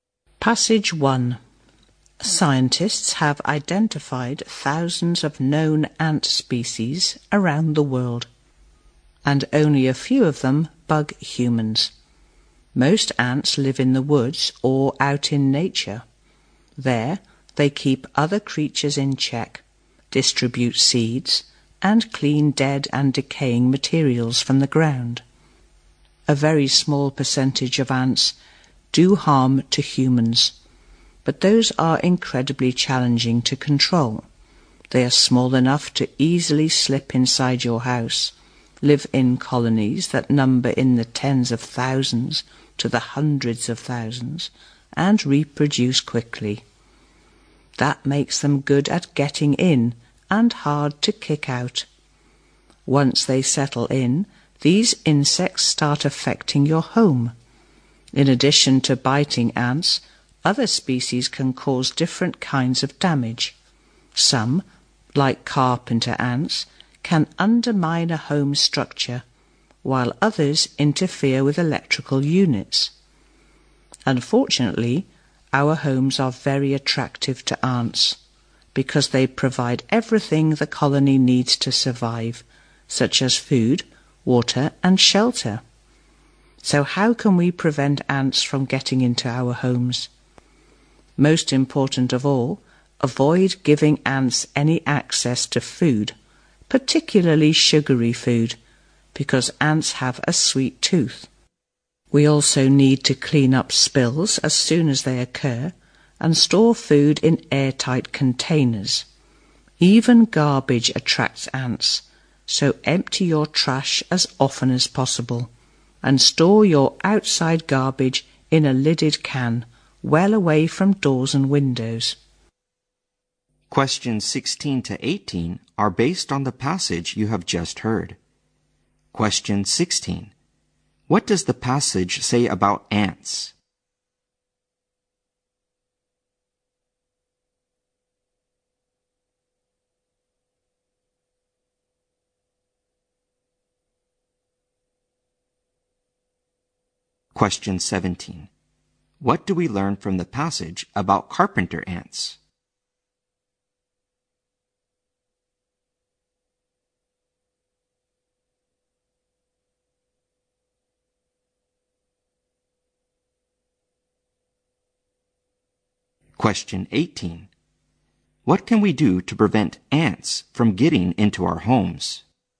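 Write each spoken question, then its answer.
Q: What do we learn from the passage about carpenter ants?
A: They can damage a home's structure.

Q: What can we do to prevent ants from getting into our homes?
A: Keep food, especially sugary food, away from them.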